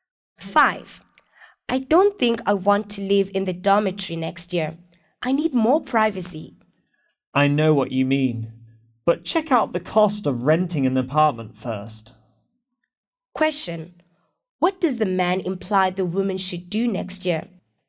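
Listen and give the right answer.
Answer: Check the cost of renting an apartment before deciding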